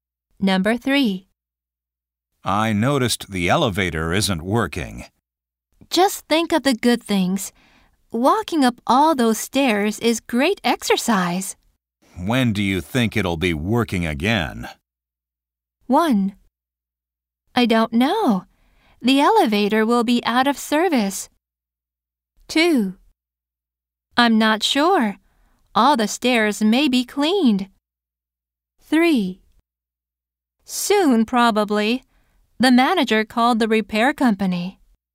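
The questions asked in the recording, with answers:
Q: When do you think it'll be working again?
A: 3: Soon, probably. The manager called the repair company.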